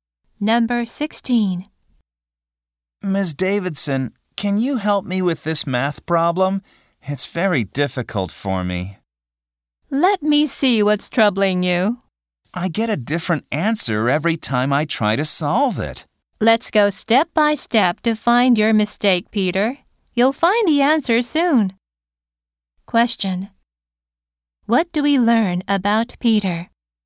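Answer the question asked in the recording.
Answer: He is having trouble solving a math problem.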